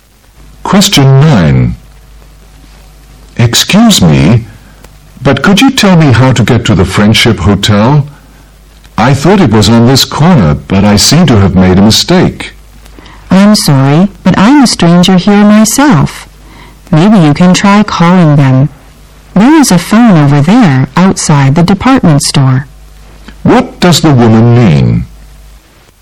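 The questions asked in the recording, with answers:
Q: What does the woman mean?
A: She doesn't know the way either, since she is a stranger there; he could call the hotel.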